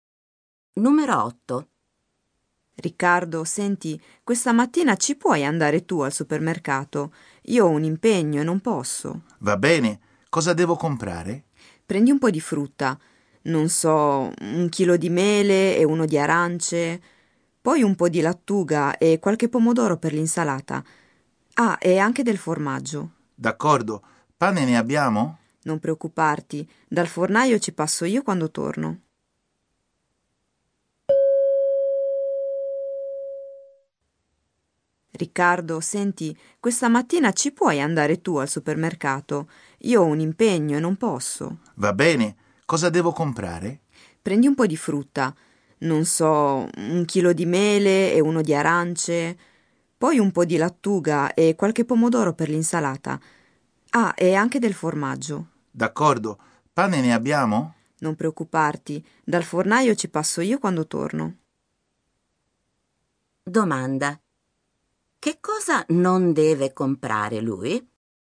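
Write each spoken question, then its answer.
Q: Domanda. Che cosa non deve comprare lui?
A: Il pane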